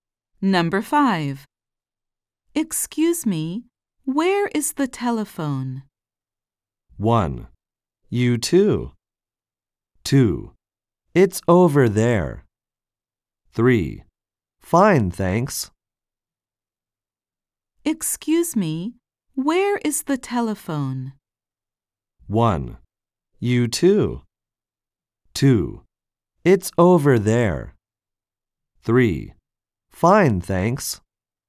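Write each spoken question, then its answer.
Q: Excuse me, where is the telephone?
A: 2: It's over there.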